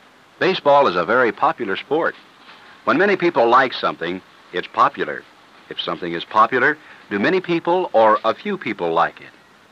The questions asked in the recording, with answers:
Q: If something is popular, do many people or a few people like it?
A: Many people like it.